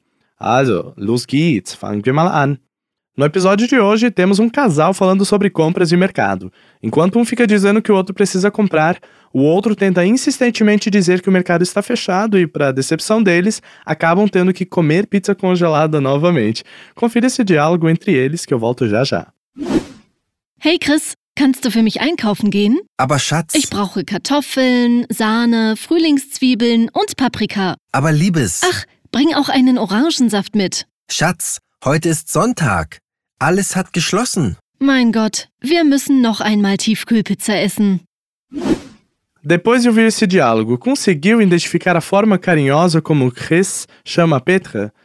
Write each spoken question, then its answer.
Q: Depois de ouvir esse diálogo, conseguiu identificar a forma carinhosa como Chris chama Petra?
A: Pois bem, chats é uma forma carinhosa de dizer amor, docinho, tesouro, amor da minha vida e por aí vai.